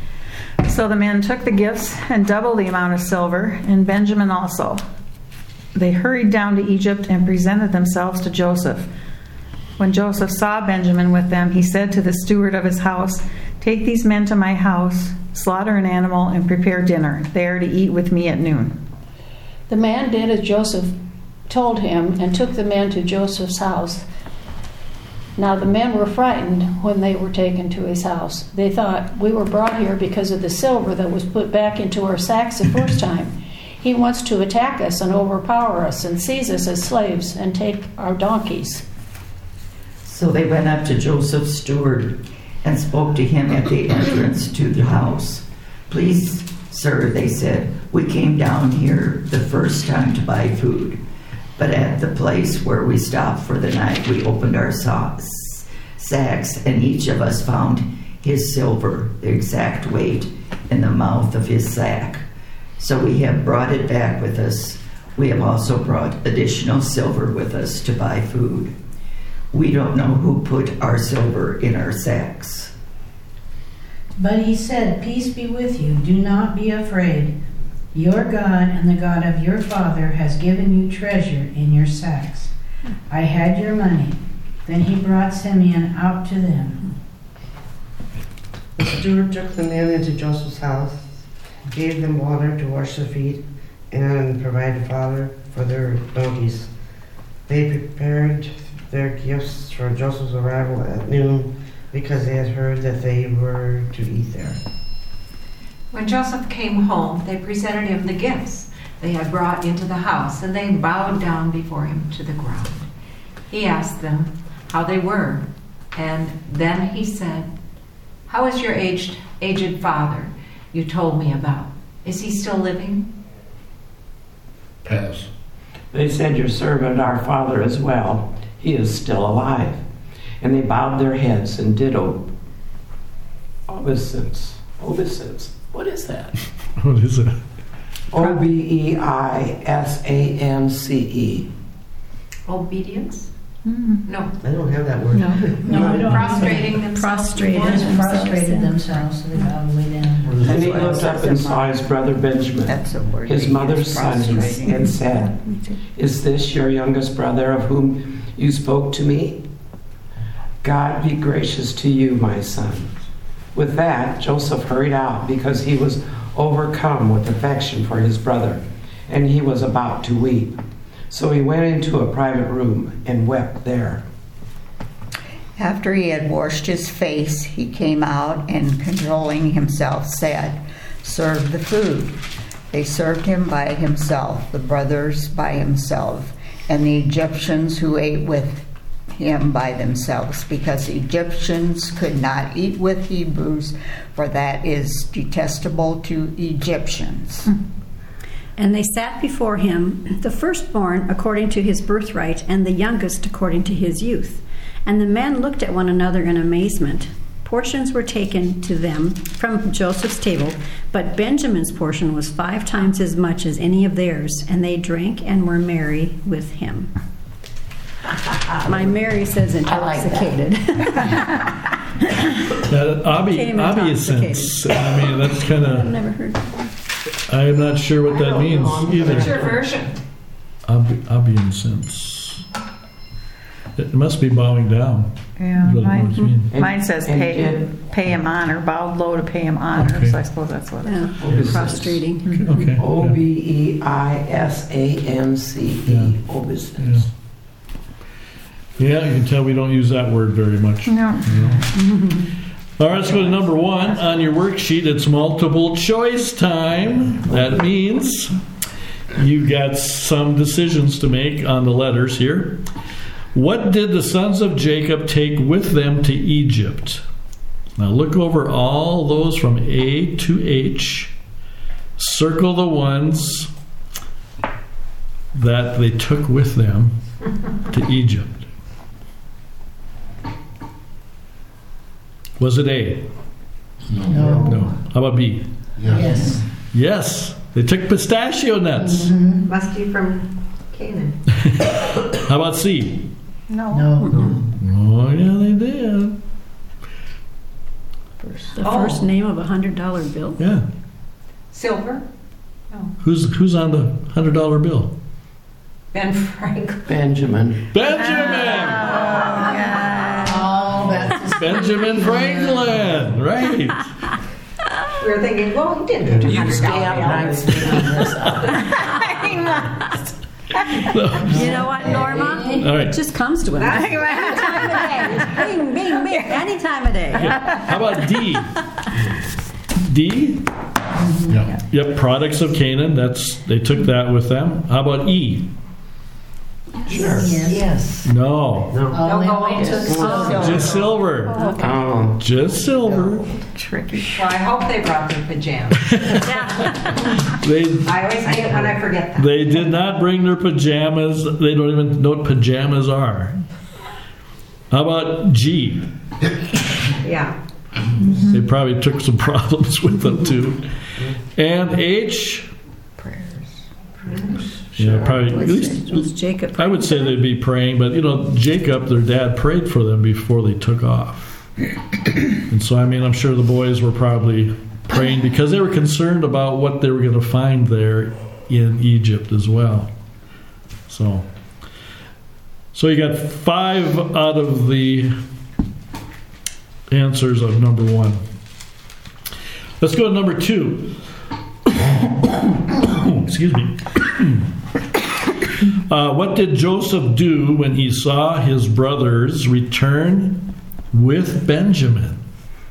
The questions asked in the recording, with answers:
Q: What did Joseph do when he saw his brothers return with Benjamin?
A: He ordered a meal.